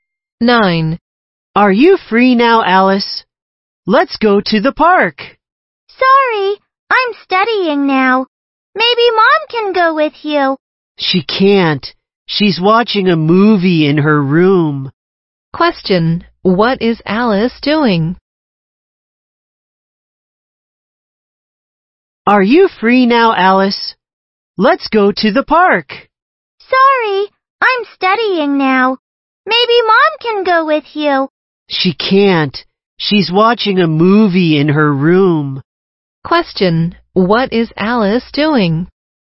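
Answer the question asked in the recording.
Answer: Studying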